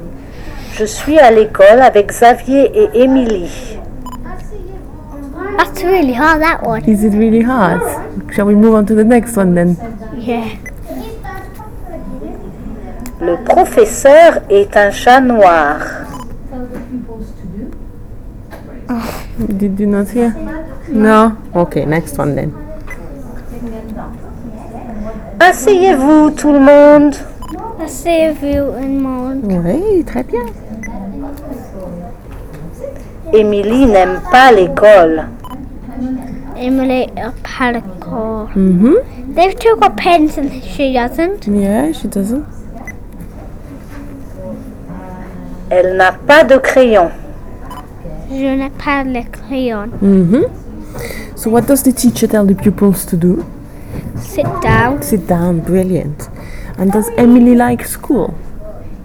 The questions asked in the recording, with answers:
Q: And does Emily like school?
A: No, she doesn't.